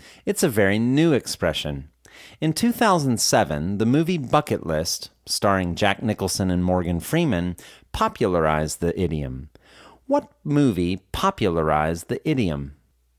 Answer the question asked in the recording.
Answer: The movie Bucket List popularized the idiom.